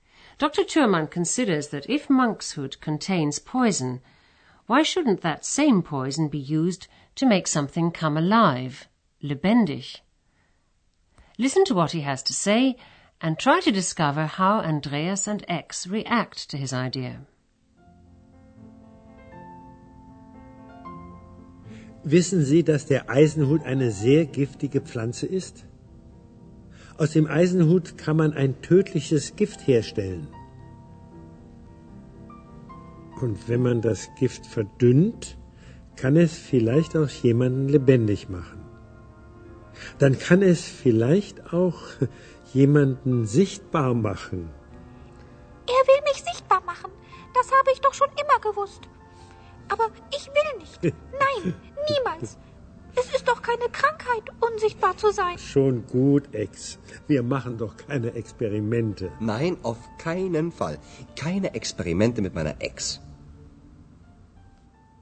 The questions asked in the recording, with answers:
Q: Listen to what he has to say and try to discover how Andreas and X react to his idea.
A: Andreas und Ex are not happy about his idea.